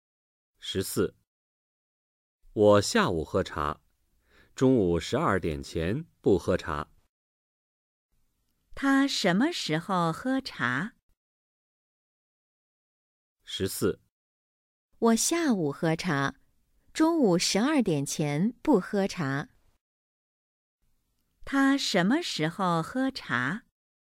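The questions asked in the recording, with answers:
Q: 他什么时候喝茶?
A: 下午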